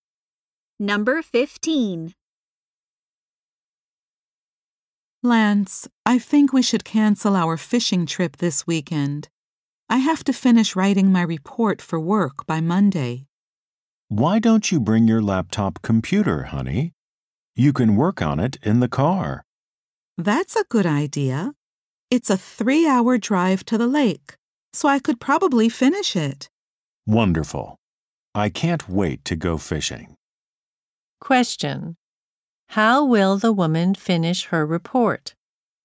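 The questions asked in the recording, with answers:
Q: How will the woman finish her report?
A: She will work on it on her laptop in the car during the drive to the lake.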